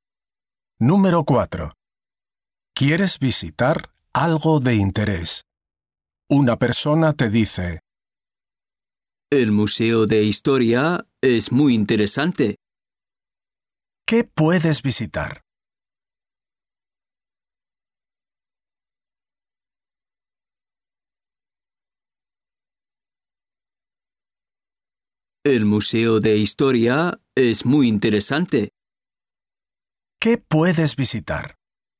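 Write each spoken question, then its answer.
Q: ¿Qué puedes visitar?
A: El Museo de Historia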